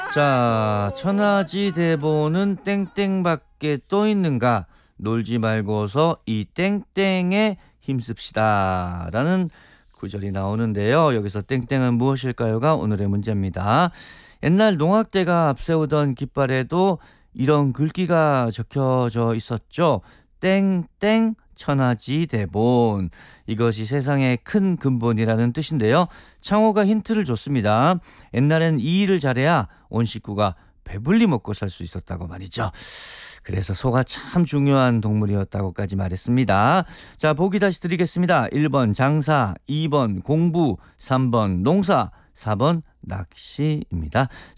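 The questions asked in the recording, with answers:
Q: 여기서 땡땡은 무엇일까요가 오늘의 문제입니다.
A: 3: 농사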